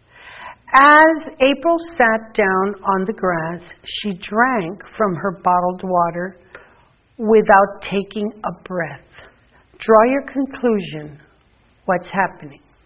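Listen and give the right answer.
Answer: April is very thirsty.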